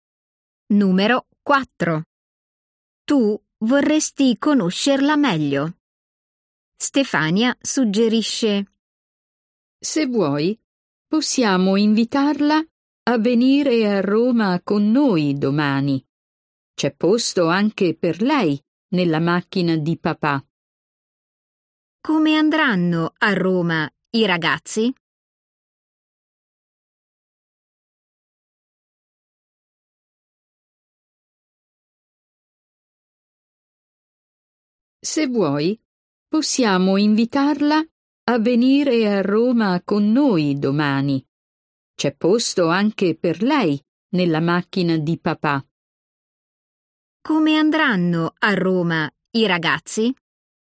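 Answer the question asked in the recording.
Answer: in macchina (del papà di Stefania)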